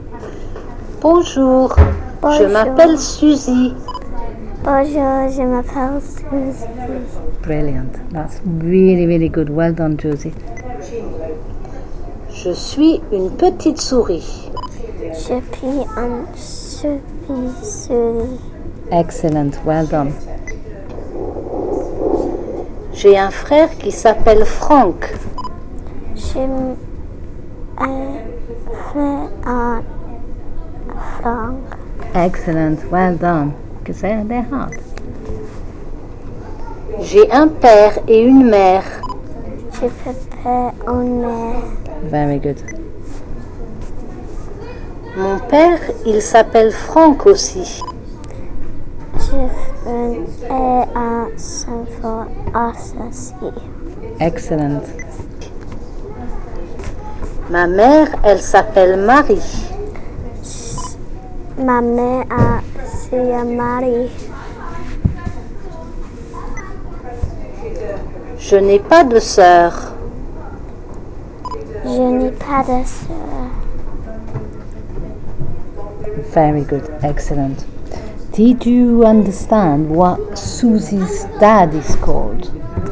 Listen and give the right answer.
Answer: Franck.